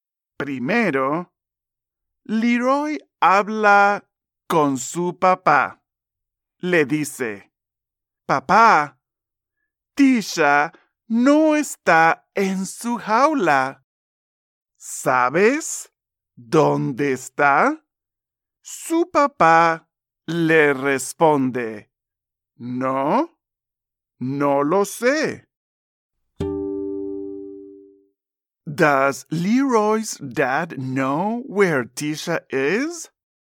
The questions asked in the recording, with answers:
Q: Does Leroy's dad know where Tisha is?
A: Correcto. No lo sabe.